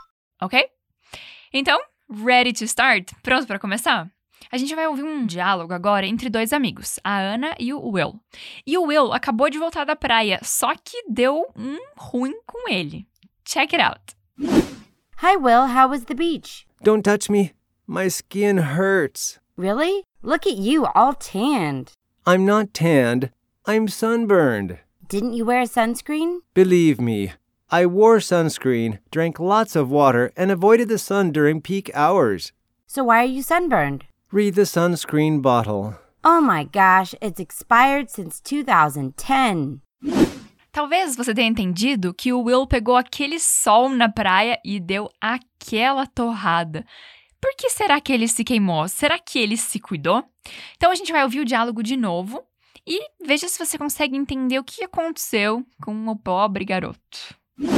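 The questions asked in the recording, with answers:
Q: Por que será que ele se queimou?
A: Porque o protetor solar estava vencido desde 2010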